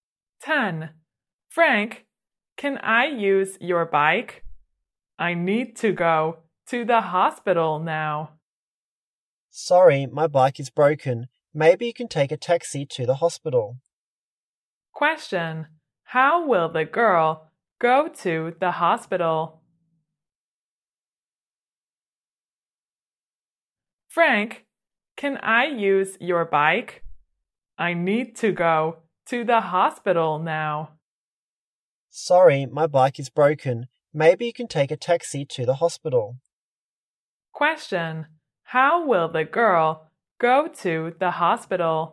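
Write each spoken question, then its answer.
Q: Question, how will the girl go to the hospital?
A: By taxi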